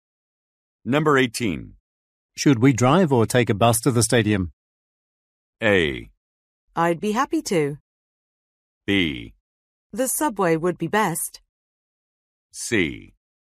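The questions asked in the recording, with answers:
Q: Should we drive or take a bus to the stadium?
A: B: The subway would be best.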